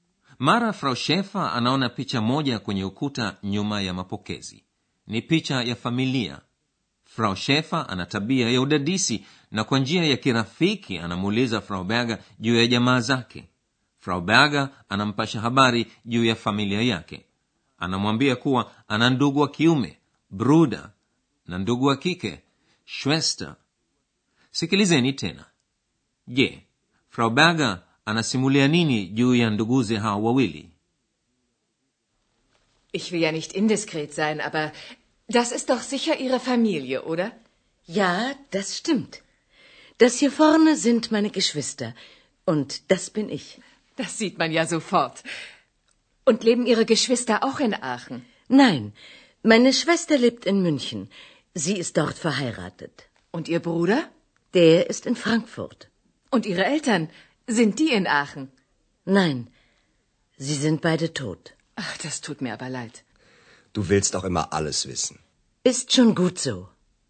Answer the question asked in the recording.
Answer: Natumaini kuwa mmeweza kusikia kuwa ndugu wa kike wa Frau Berger ameolewa na anaishi Munich.